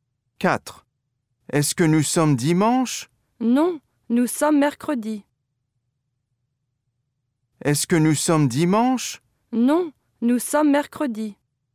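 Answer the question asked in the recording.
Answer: non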